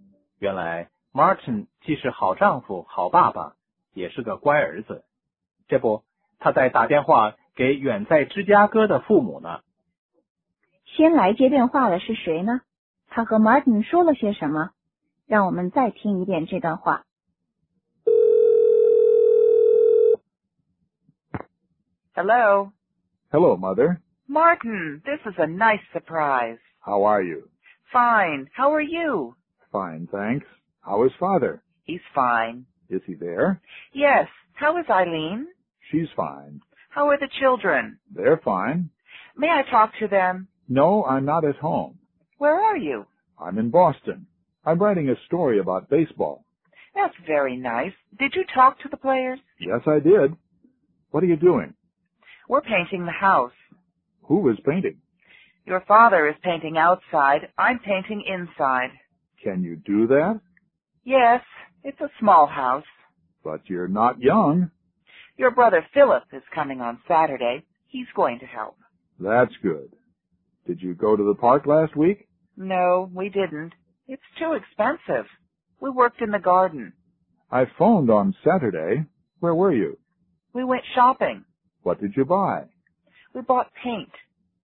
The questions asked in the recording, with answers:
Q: 先来接电话的是谁呢?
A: 先和 Martin 说话的是他的妈妈。